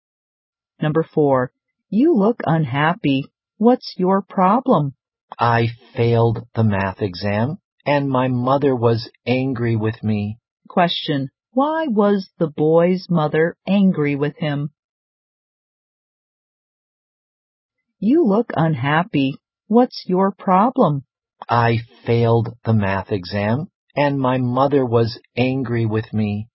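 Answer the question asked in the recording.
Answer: He failed the math exam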